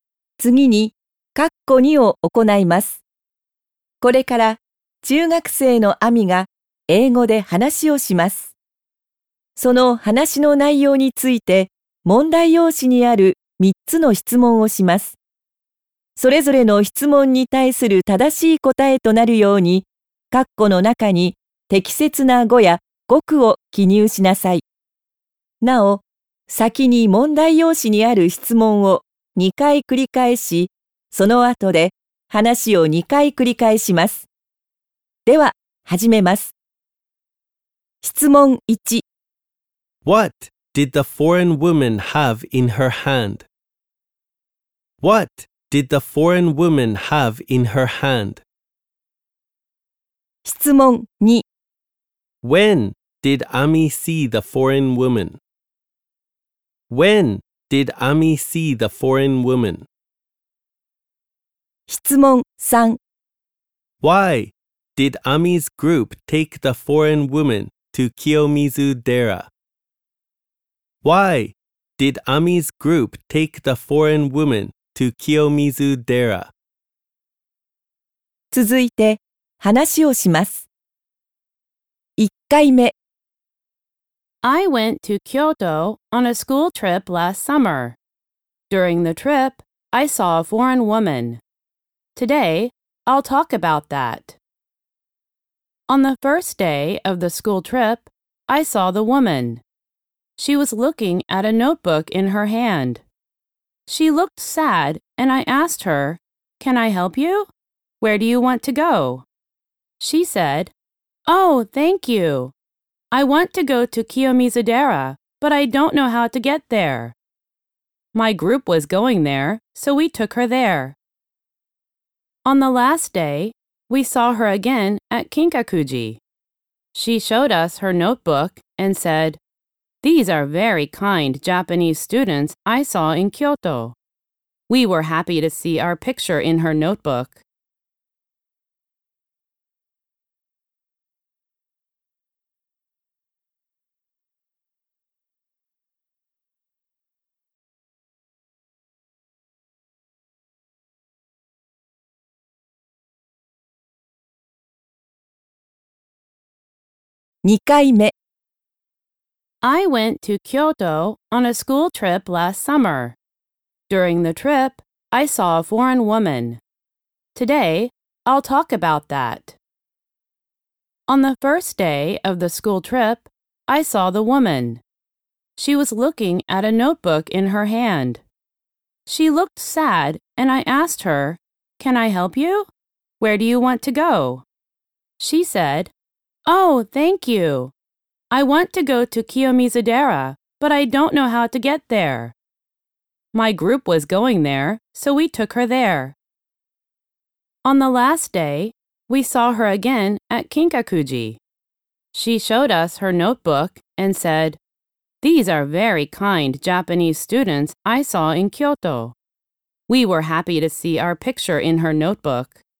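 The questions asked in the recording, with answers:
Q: What did the foreign woman have in her hand?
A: A notebook.

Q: When did Ami see the foreign woman?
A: On the first day of the school trip.

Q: Why did Ami's group take the foreign woman to Kiyomizu Dera?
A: Because the group was going there.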